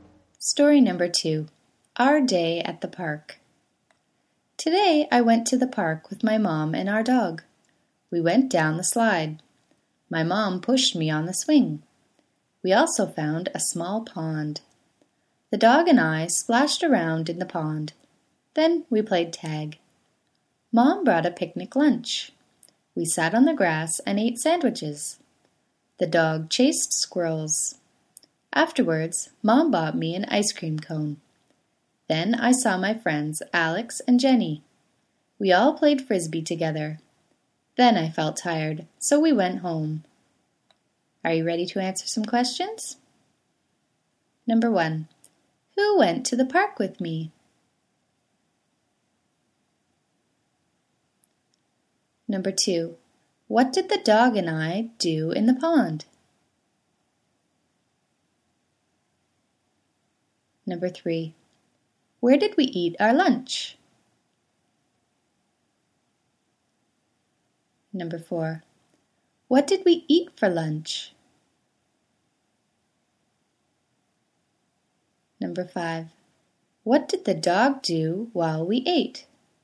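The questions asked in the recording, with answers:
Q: who went to the park with me?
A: My mom and our dog

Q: what did the dog and I do in the pond?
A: Splashed around

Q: where did we eat our lunch?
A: On the grass

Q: what did we eat for lunch?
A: Sandwiches

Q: what did the dog do while we ate?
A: Chased squirrels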